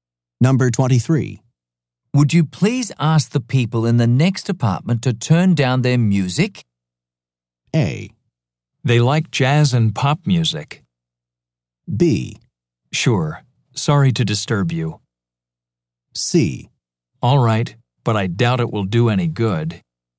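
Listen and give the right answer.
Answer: C: All right, but I doubt it will do any good.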